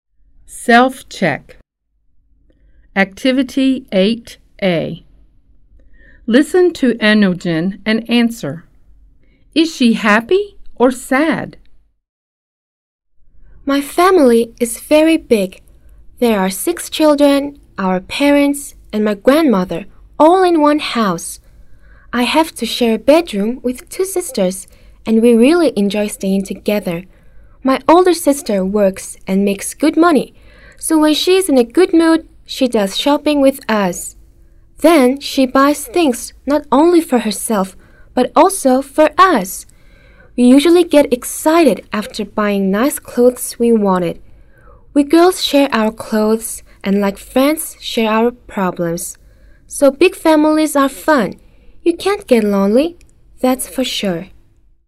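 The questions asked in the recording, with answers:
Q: Is she happy or sad?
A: Happy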